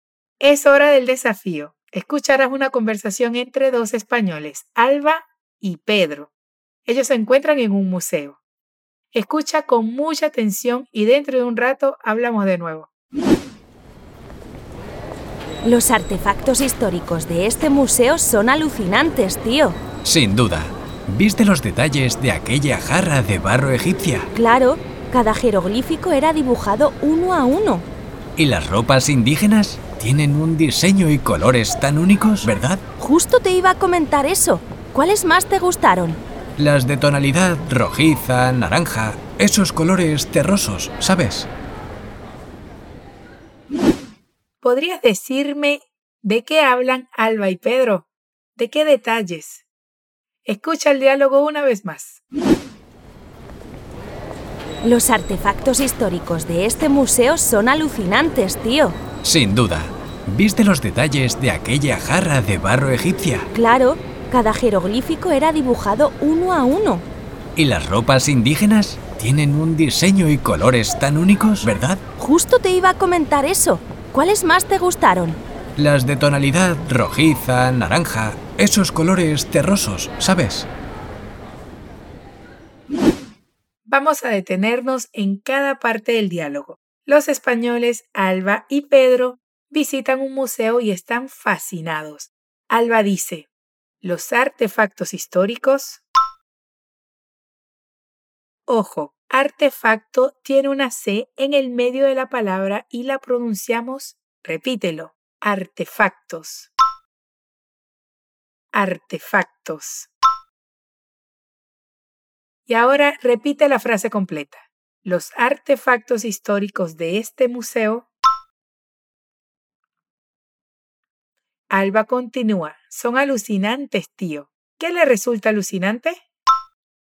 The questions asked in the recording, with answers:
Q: ¿Qué le resulta alucinante?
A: Los artefactos históricos.